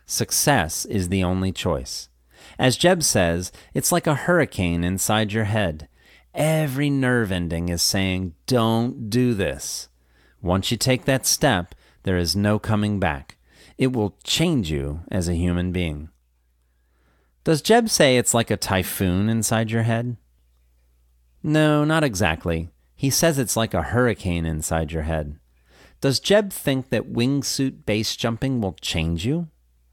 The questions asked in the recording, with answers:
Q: Does Jeb think that wingsuit base jumping will change you?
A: Yes, he does. He thinks it will change you as a human being.